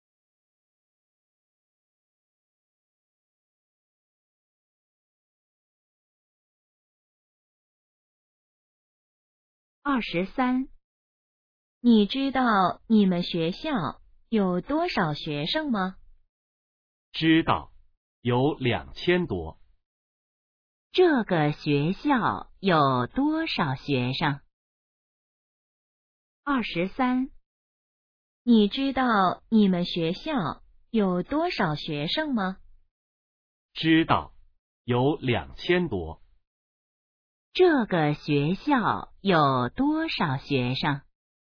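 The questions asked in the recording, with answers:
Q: 这个学校有多少学生?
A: 两千多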